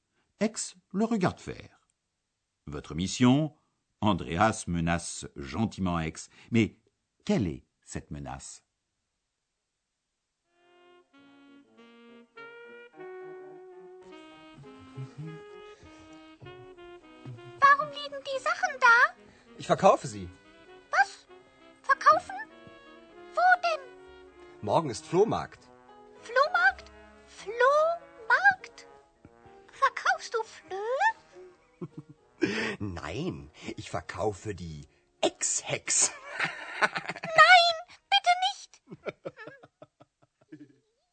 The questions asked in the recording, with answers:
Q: Mais quelle est cette menace?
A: Andreas menace Ex de la vendre elle aussi.